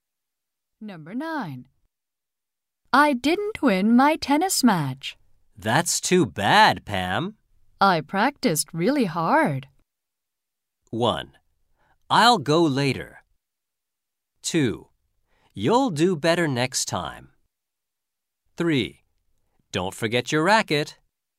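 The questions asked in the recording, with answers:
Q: I practiced really hard.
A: 2: You'll do better next time.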